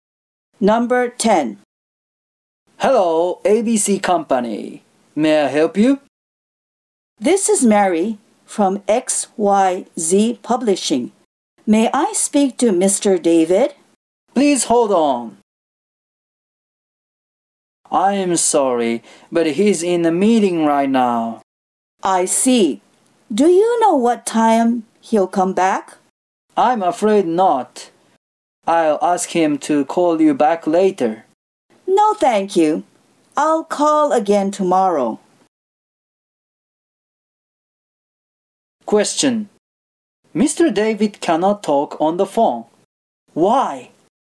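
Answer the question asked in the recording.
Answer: Because he is in a meeting.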